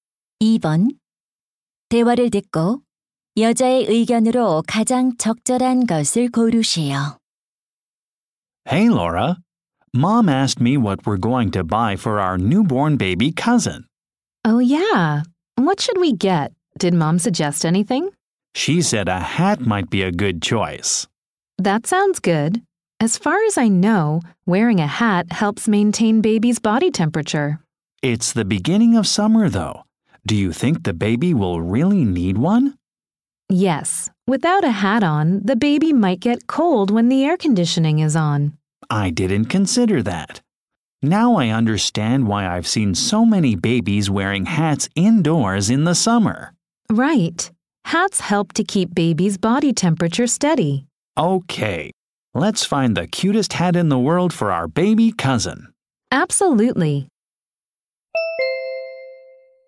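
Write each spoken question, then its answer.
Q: 대화를 듣고 여자의 의견으로 가장 적절한 것을 고르시오.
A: 모자는 아기의 체온을 유지하는 데 도움이 된다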